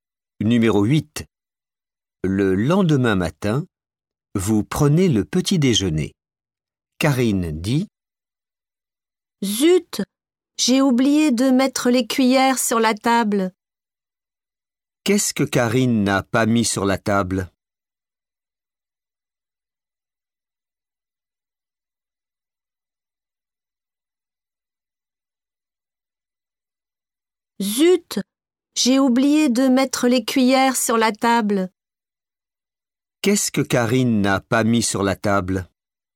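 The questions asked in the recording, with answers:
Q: Qu'est-ce que Karine n'a pas mis sur la table?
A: Les cuillères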